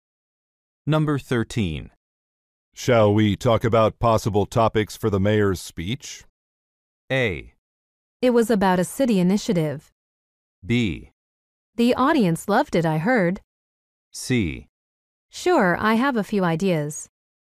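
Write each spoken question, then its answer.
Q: Shall we talk about possible topics for the mayor's speech?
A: C: Sure, I have a few ideas.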